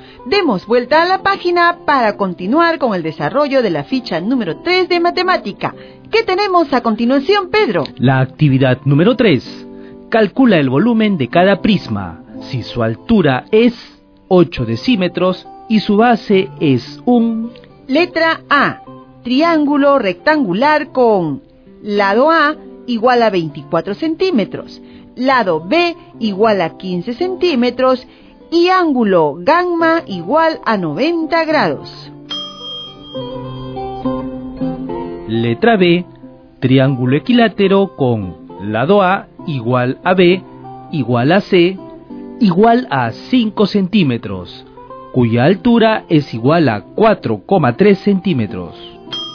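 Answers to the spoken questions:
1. 14 400 cm3 (área de la base 180 cm2 × 80 cm)
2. 860 cm3 (área de la base 10,75 cm2 × 80 cm)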